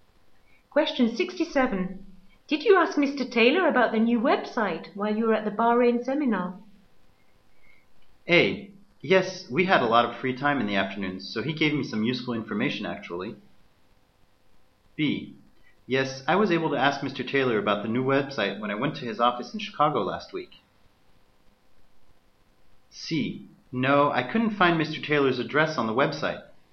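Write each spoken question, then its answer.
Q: Taylor about the new website while you were at the Bahrain seminar?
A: A: Yes, we had a lot of free time in the afternoons, so he gave me some useful information, actually.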